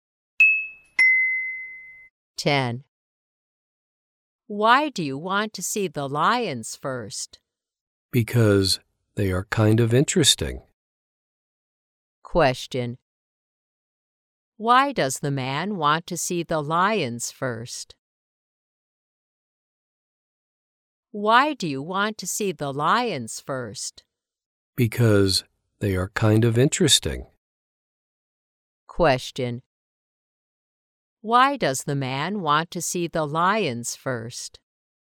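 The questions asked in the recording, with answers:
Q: Why does the man want to see the lions first?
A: Because they are kind of interesting.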